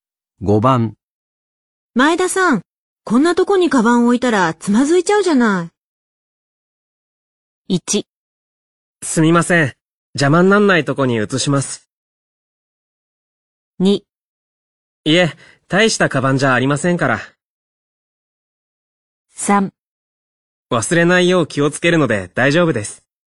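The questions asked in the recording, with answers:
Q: 前田さん、こんなとこにカバン置いたらつまずいちゃうじゃない。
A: 1: すみません。邪魔になんないとこに移します。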